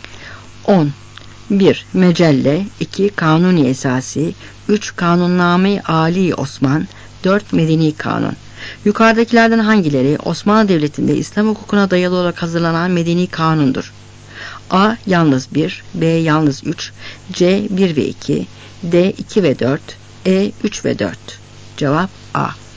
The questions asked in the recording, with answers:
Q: Yukarıdakilerden hangileri Osmanlı Devleti'nde İslam hukukuna dayalı olarak hazırlanan medeni kanundur?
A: Cevap A.